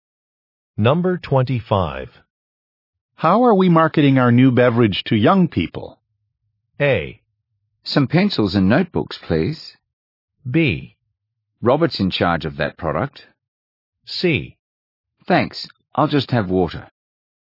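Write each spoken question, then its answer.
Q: How are we marketing our new beverage to young people?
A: B: Robert's in charge of that product.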